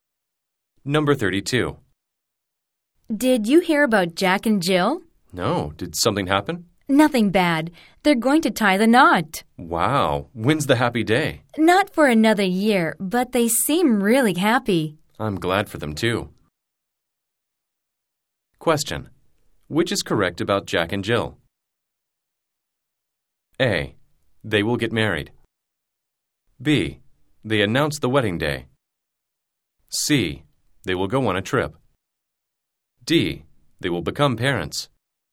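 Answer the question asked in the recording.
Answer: A: They will get married.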